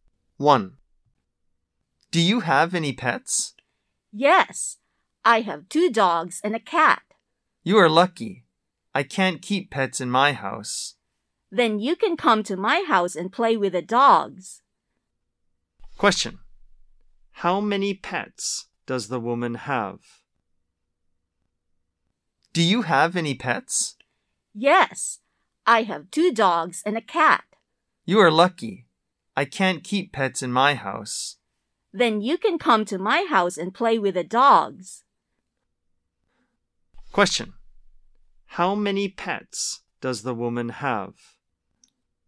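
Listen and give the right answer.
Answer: Three (two dogs and a cat)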